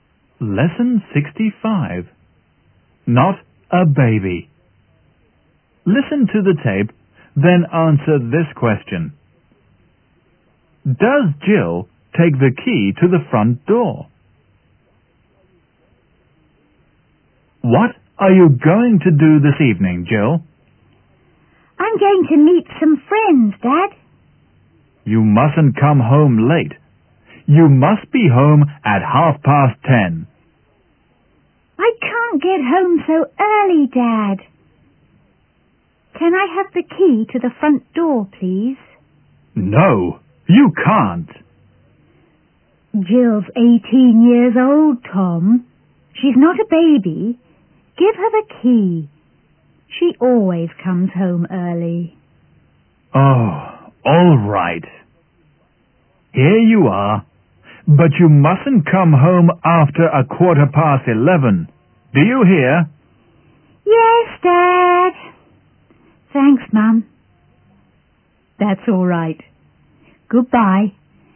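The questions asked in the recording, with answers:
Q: Does Jill take the key to the front door?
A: Yes, she does.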